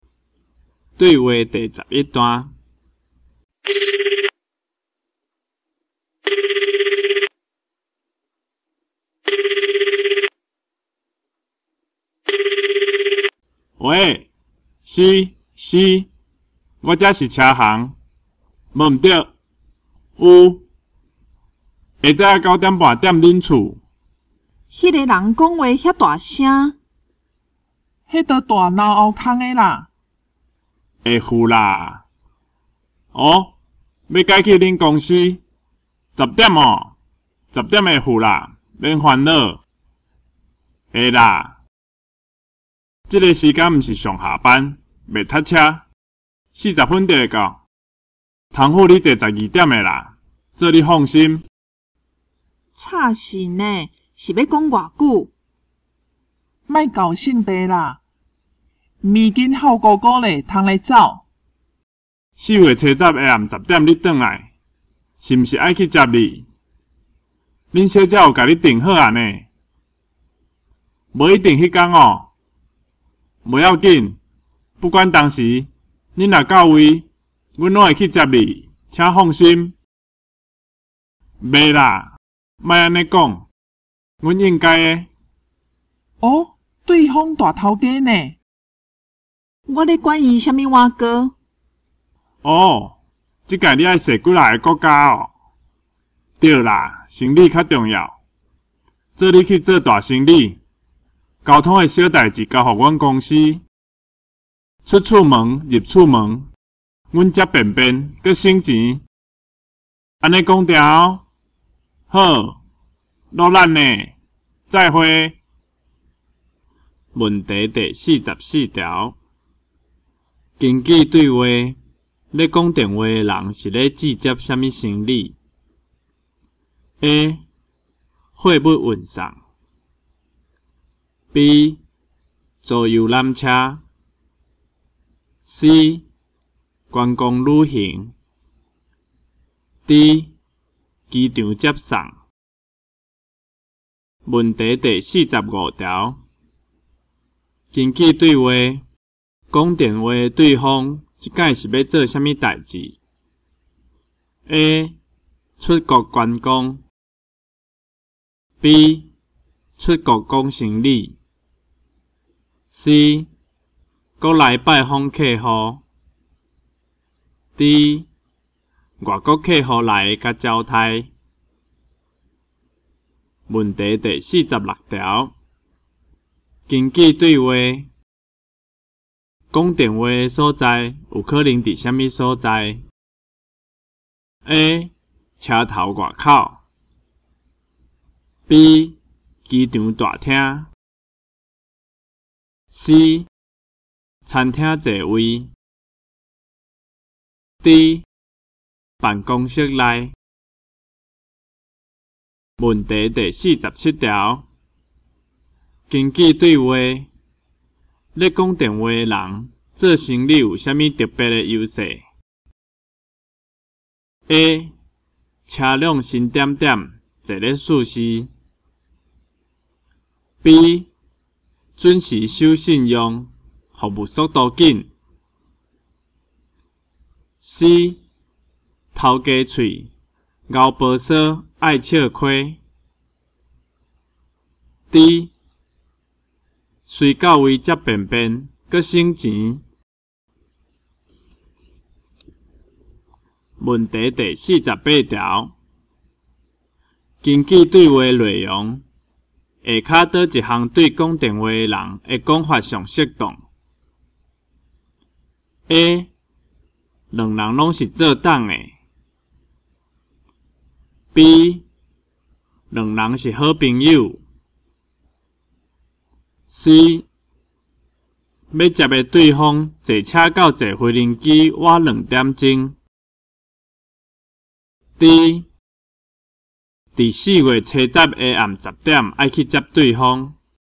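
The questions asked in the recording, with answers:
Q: 根据对话,咧讲电话的人是咧拒接什么行李 ?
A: D: 机场接送

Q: 根据对话讲电话对方这次是要做什么代志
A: B: 出国讲行李

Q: 根据对话咧讲电话的人做生理有啥物特别的优势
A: D: 随到位接便便,阁省钱。

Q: 根据对话内容。下卡倒一项对讲电话的人的讲法上适当 ?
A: D: 伫四月七十下暗十点,爱去接对方。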